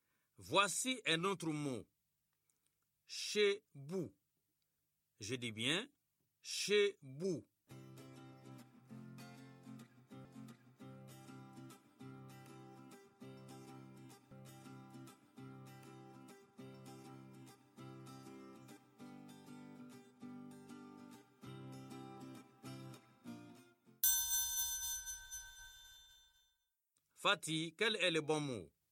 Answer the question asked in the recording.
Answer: Boucher, monsieur.